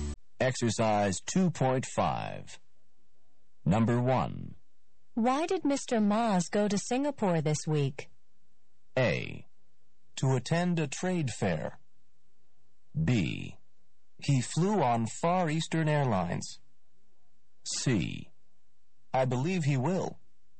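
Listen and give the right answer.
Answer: A: To attend a trade fair.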